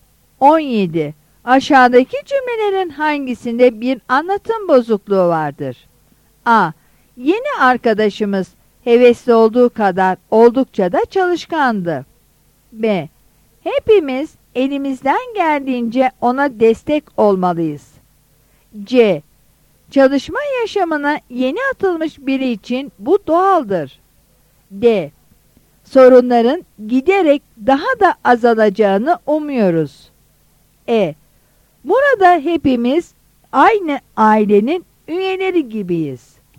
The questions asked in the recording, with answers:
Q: Aşağıdaki cümlelerin hangisinde bir anlatım bozukluğu vardır?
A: Yanıt A'dır.